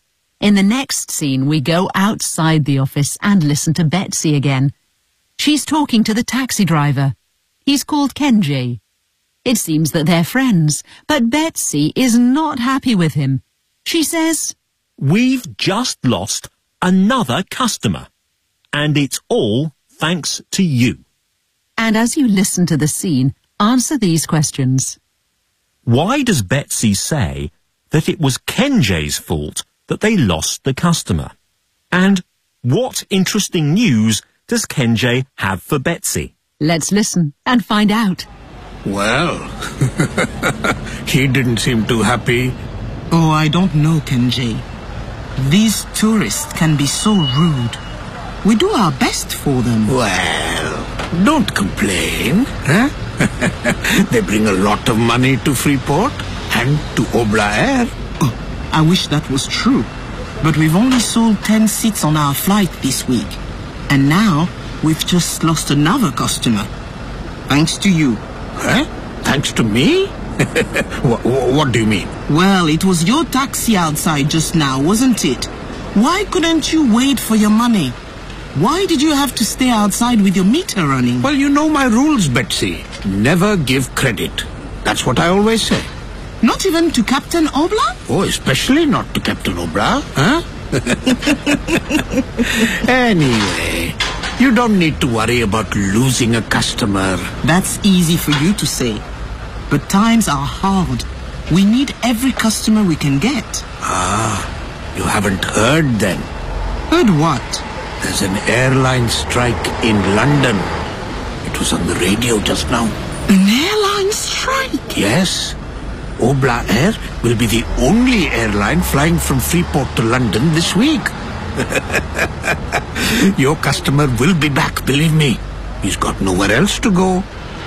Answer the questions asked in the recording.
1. Because Kenji caused trouble for the captain, as he didn't wait for him to pay his taxi fare.
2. There's an airline strike in London.